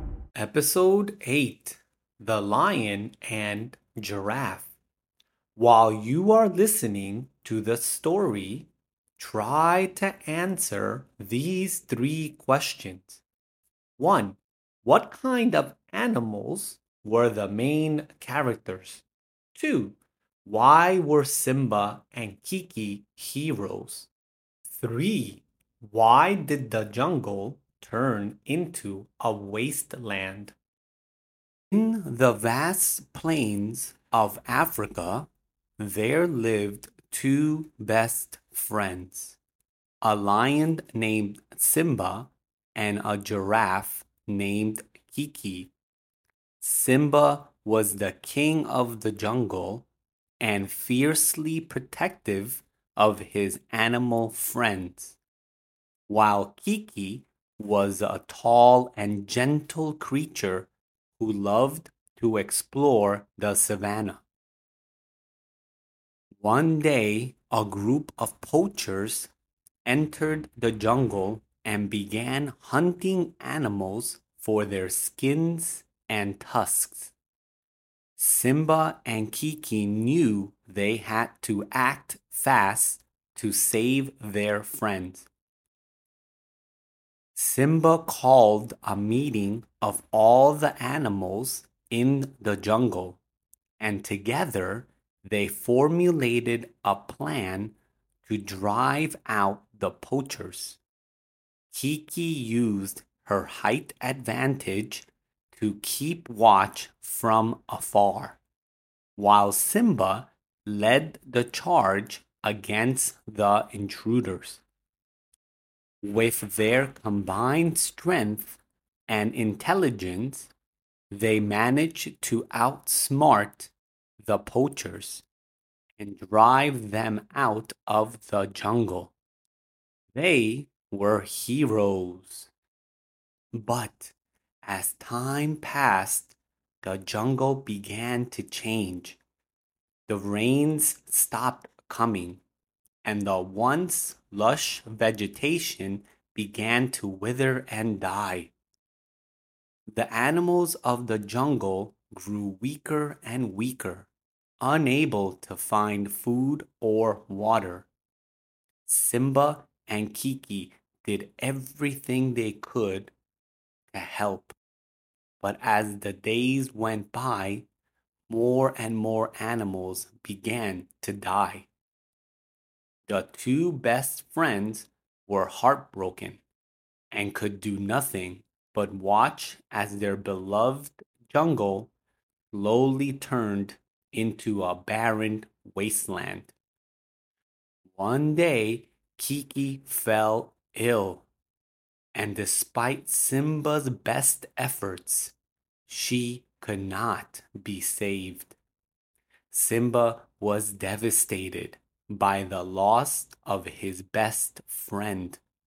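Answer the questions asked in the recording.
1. A lion and a giraffe
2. They drove the poachers out of the jungle
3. The rains stopped coming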